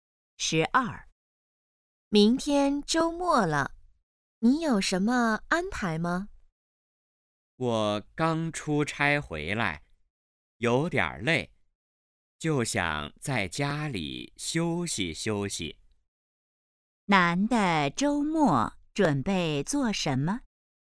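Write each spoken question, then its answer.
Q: 男的周末准备做什么?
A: 在家休息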